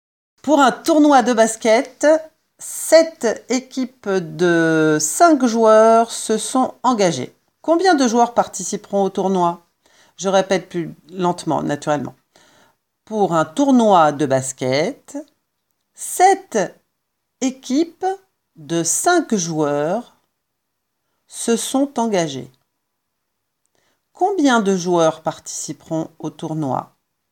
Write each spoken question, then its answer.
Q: Combien de joueurs participeront au tournoi?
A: 35 joueurs participeront au tournoi.